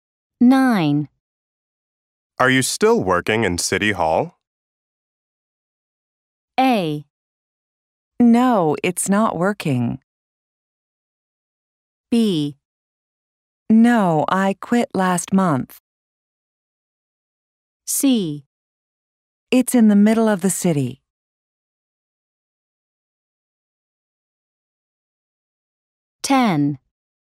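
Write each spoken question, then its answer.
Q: Are you still working in City Hall?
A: B: No, I quit last month.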